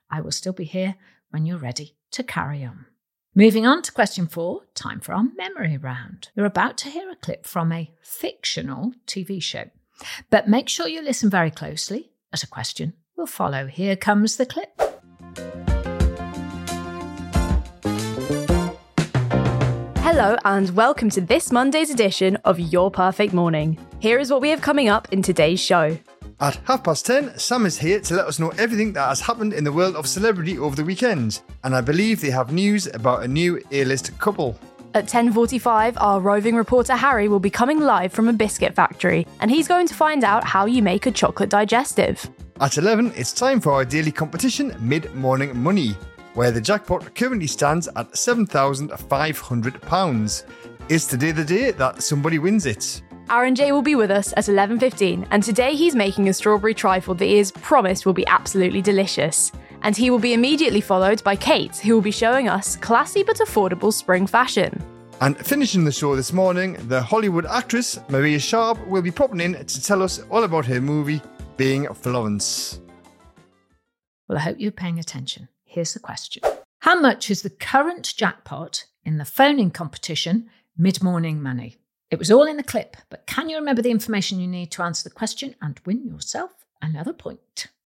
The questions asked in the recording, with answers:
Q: How much is the current jackpot in the phoning competition, Mid-Morning Money?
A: £7,500